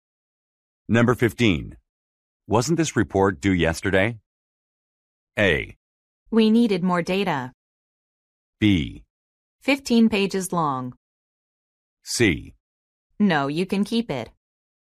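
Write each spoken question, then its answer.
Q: Wasn't this report due yesterday?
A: A: We needed more data.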